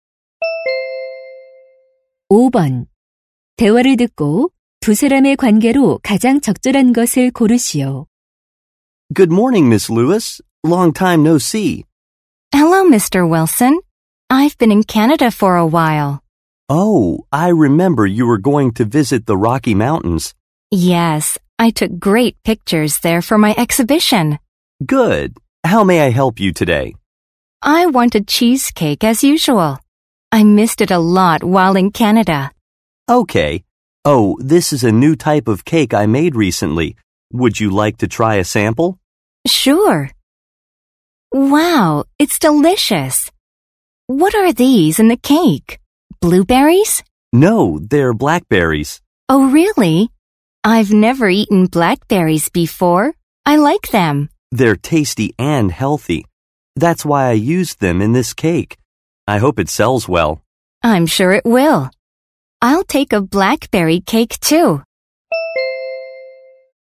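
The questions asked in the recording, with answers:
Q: 대화를 듣고 두 사람의 관계로 가장 적절한 것을 고르시오.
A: 사진작가 - 제과점 주인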